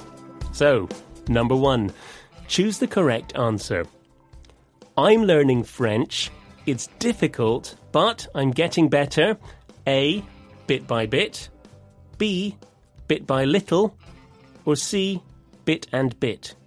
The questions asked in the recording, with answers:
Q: I'm learning French. It's difficult, but I'm getting better.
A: And the answer is A, bit by bit.